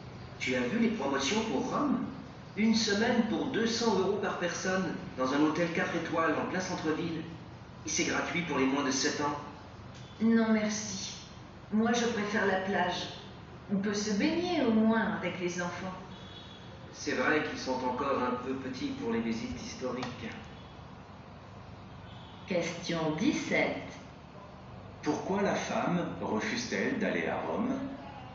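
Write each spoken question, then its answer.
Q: Pourquoi la femme refuse-t-elle d'aller à Rome ?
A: Elle préfère la plage, où on peut se baigner avec les enfants.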